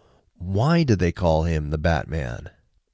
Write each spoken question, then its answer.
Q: Why do they call him the Batman?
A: They call him the Batman because of his ability to use sounds to sense the world.